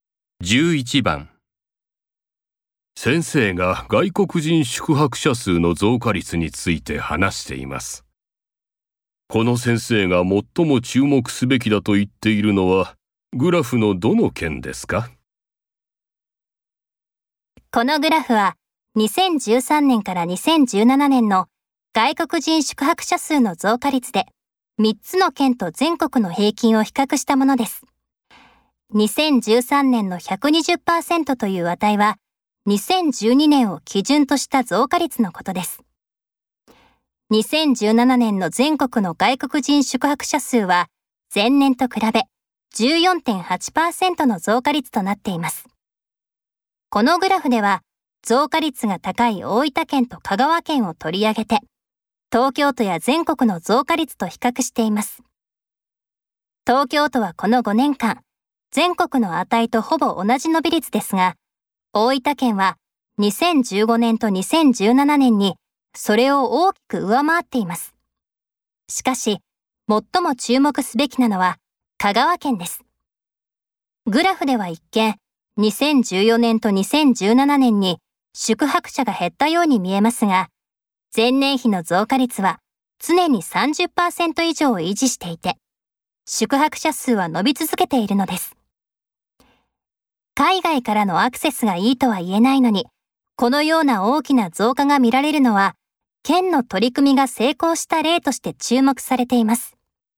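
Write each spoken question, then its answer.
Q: この先生が最も注目すべきだと言っているのはグラフのどの件ですか?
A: 香川県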